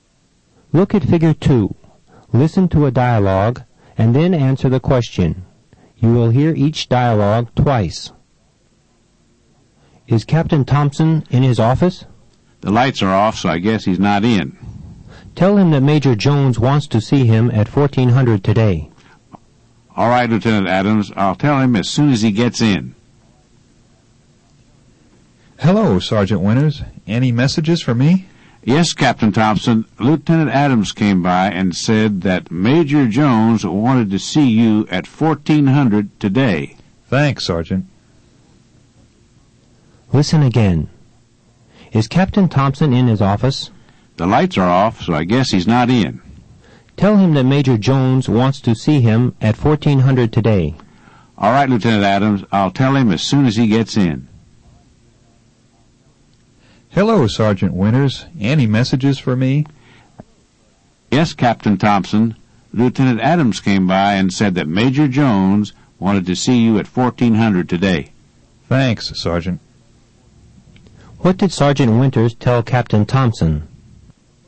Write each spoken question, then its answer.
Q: What did Sergeant Winters tell Captain Thompson?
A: He told him that Lieutenant Adams came by and said that Major Jones wanted to see him at 1400 today.